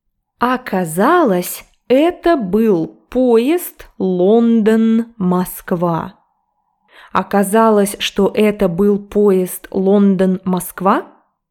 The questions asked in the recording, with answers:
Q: Оказалось, что это был поезд Лондон-Москва?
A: Да, это был поезд Лондон-Москва, а не поезд до Хогвартса.